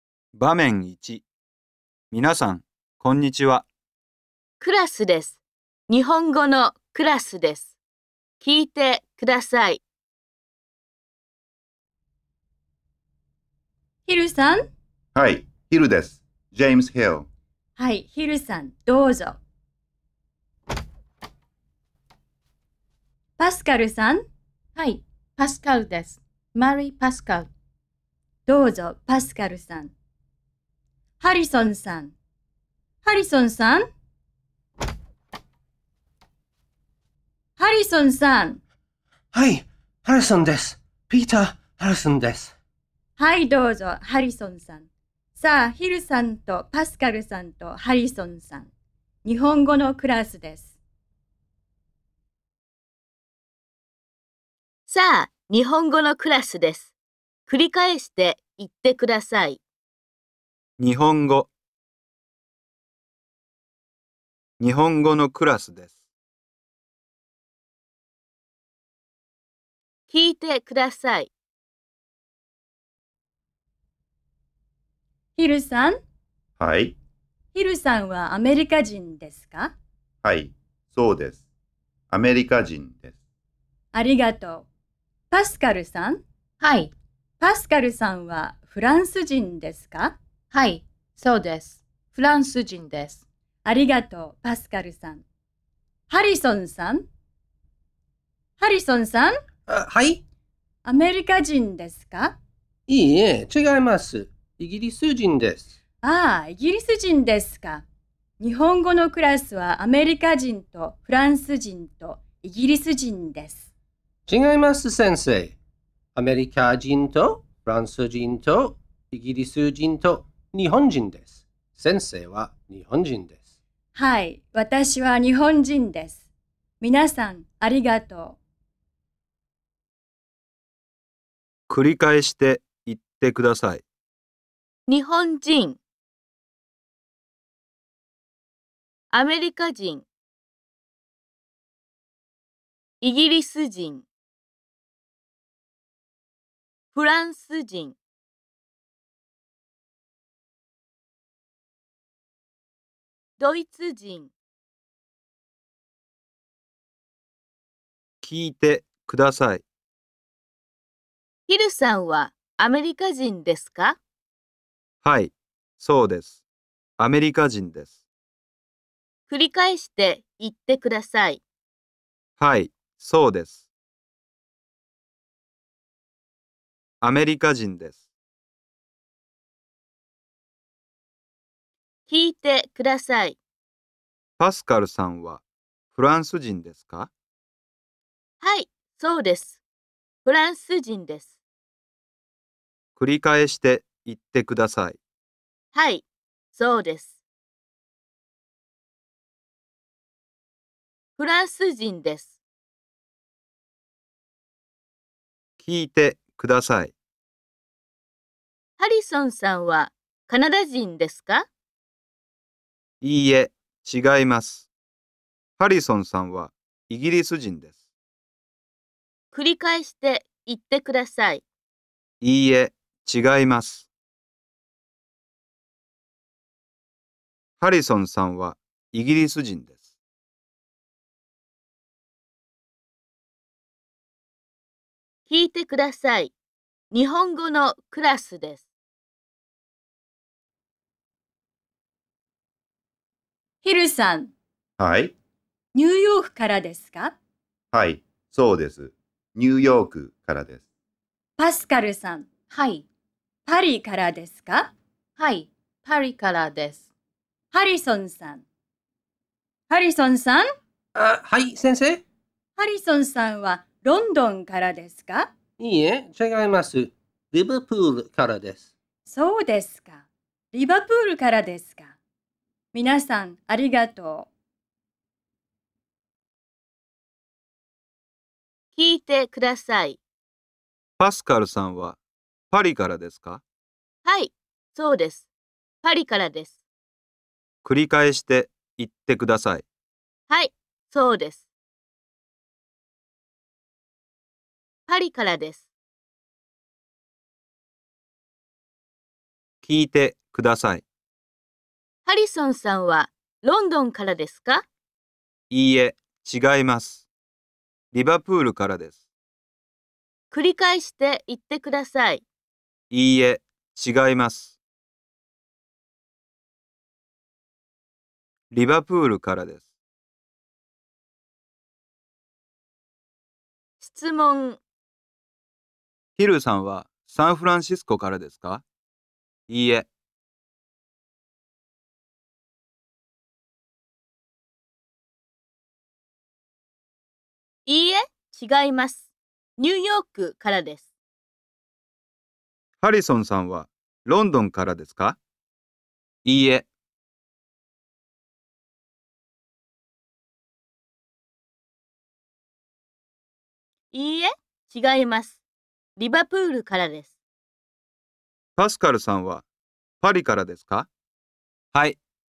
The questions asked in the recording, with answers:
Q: ヒルさんはサンフランシスコからですか?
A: いいえ、違います。ニューヨークからです。

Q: ハリソンさんはロンドンからですか?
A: いいえ、違います。リバプールからです。

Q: パスカルさんはパリからですか?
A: はい、そうです。パリからです。